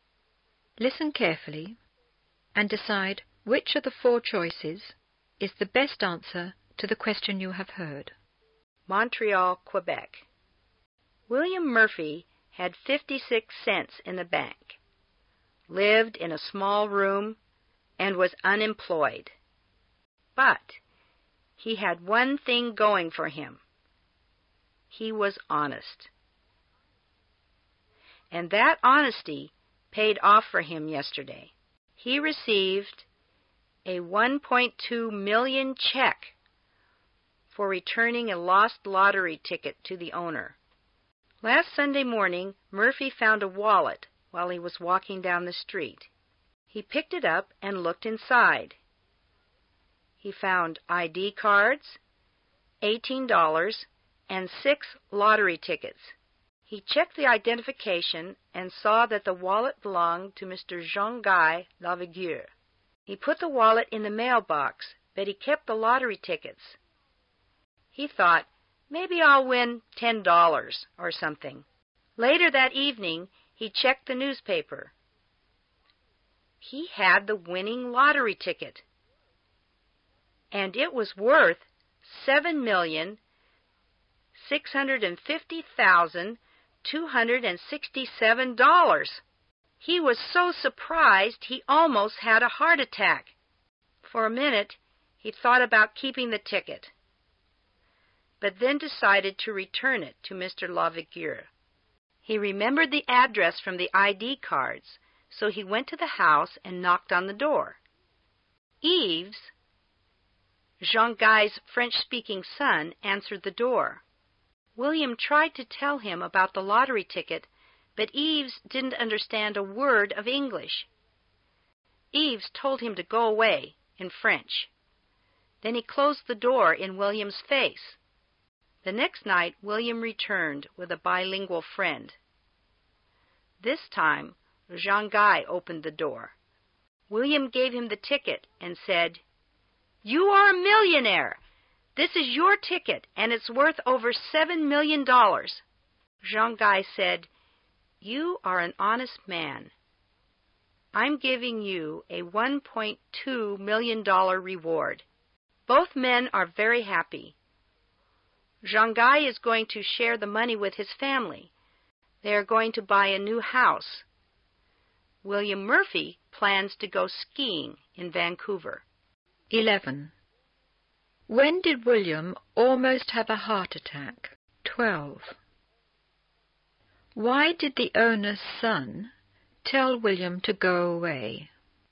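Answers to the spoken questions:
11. When he checked the newspaper and saw that he had the winning lottery ticket worth over $7 million
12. Because he didn't understand a word of English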